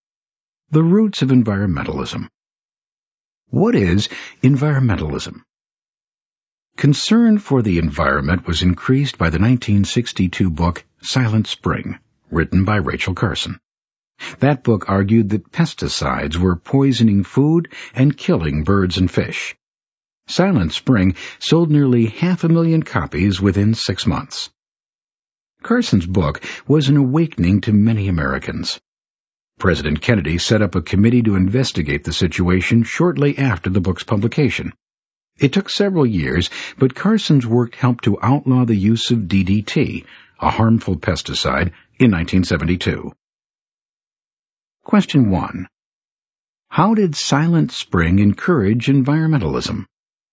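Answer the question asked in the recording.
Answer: It showed that pesticides were poisoning food and killing birds and fish, awakening Americans and helping to outlaw DDT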